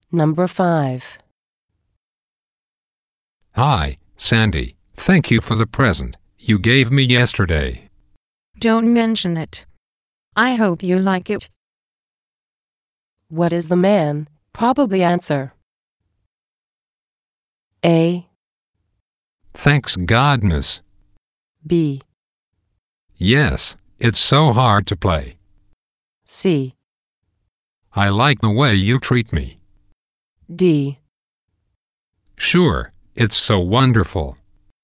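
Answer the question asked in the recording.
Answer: D: Sure, it's so wonderful.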